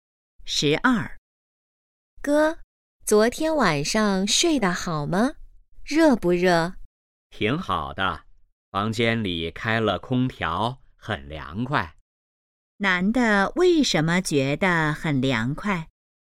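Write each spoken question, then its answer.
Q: 男的为什么觉得很凉快?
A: 房间里开了空调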